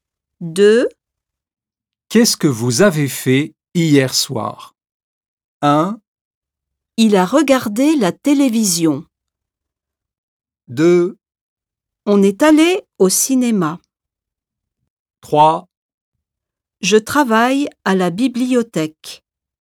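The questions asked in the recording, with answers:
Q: Qu'est-ce que vous avez fait hier soir?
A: 2: On est allé au cinéma.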